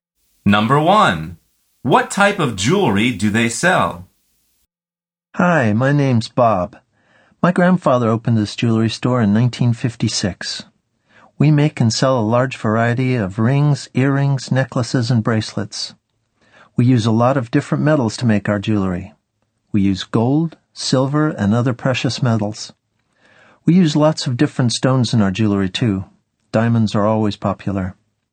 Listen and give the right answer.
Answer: The answer is rings, earrings, necklaces, and bracelets.